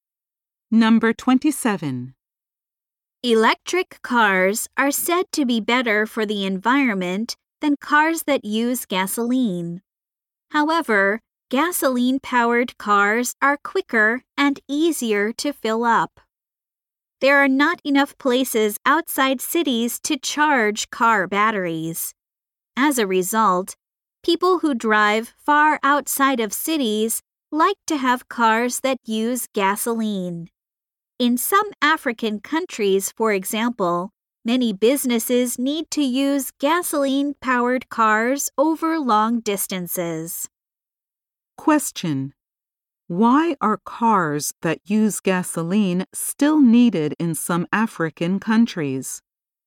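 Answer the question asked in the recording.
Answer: Businesses must drive long distances where there are few places to charge batteries.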